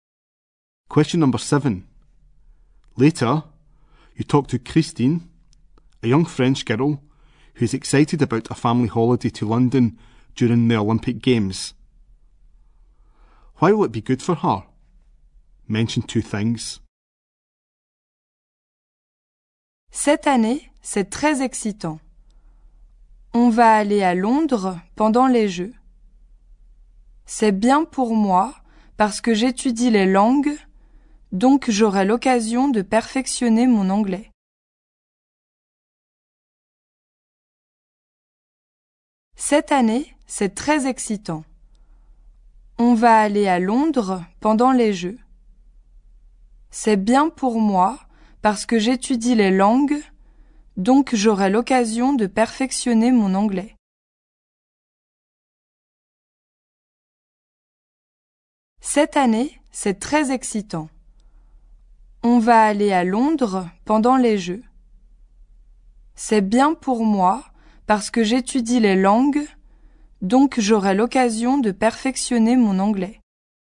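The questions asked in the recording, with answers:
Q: Why will it be good for her? Mention 2 things.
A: She studies languages, so she can perfect her English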